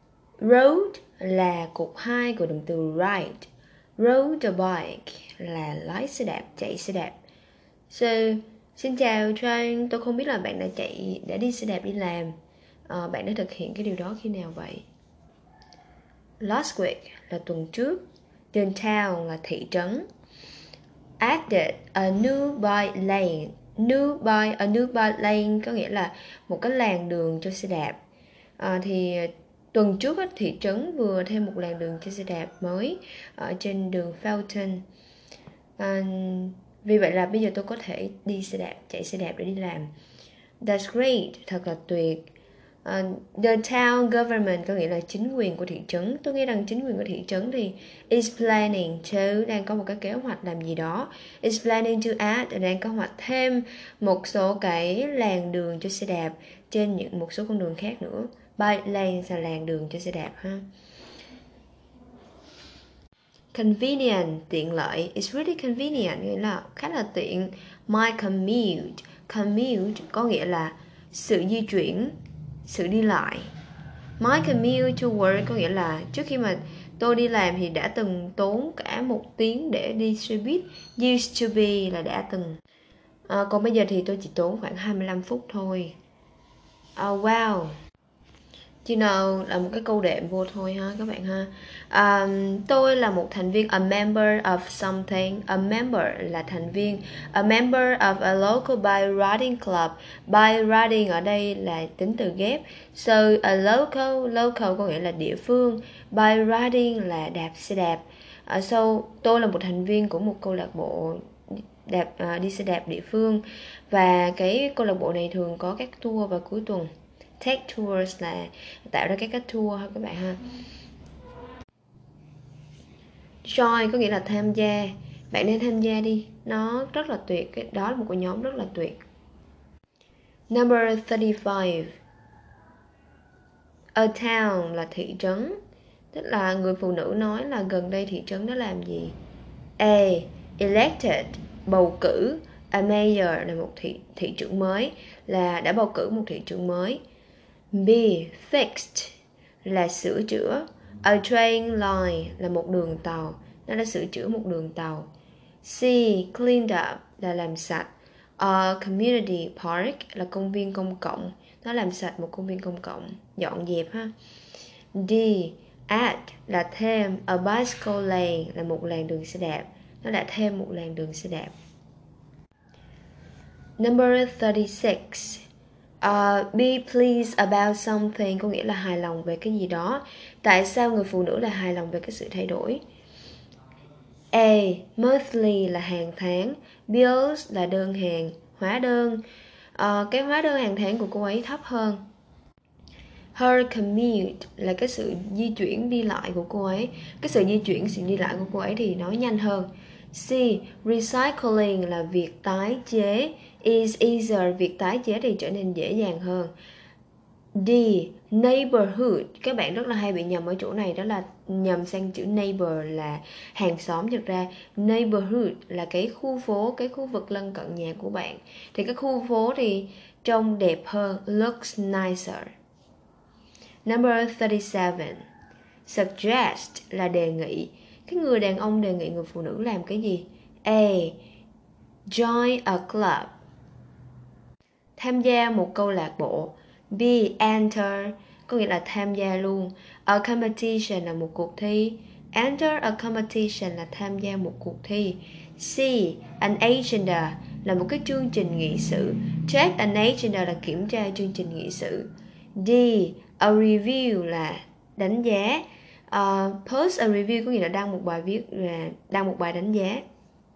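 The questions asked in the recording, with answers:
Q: Tức là người phụ nữ nói là gần đây thị trấn đó làm gì?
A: D: Added a bicycle lane (thêm một làn đường xe đạp)

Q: Tại sao người phụ nữ lại hài lòng về cái sự thay đổi?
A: B: Her commute is faster (sự đi lại nhanh hơn)

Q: Cái người đàn ông đề nghị người phụ nữ làm cái gì?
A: A: Join a club (tham gia một câu lạc bộ)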